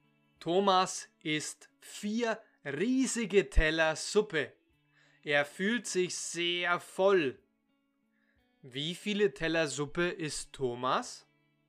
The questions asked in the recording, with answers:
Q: Wie viele Teller Suppe isst Thomas?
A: Vier. Er isst vier riesige Teller Suppe.